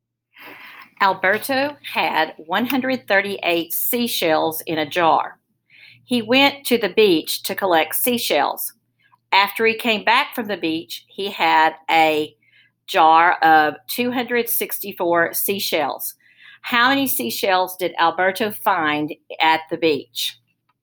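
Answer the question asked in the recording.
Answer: 126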